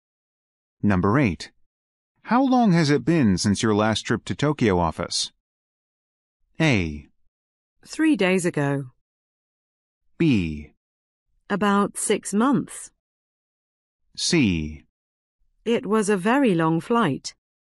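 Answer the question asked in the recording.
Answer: B: About 6 months.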